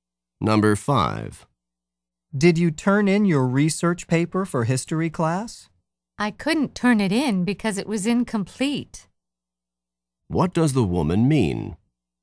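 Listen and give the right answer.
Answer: She didn't turn in the paper because it wasn't finished.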